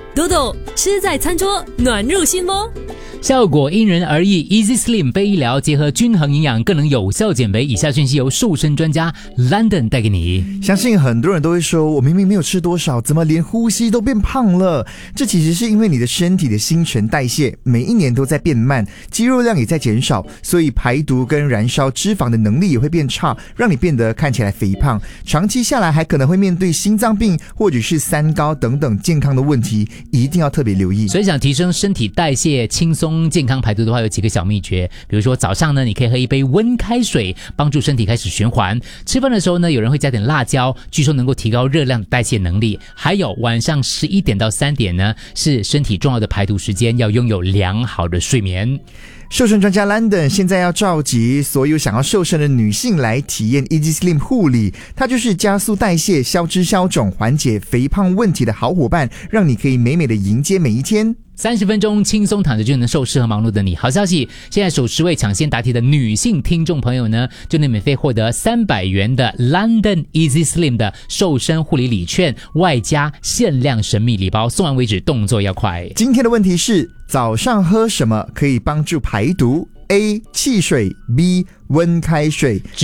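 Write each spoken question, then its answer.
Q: 今天的问题是,早上喝什么可以帮助排毒?A 汽水, B 温开水。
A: B: 温开水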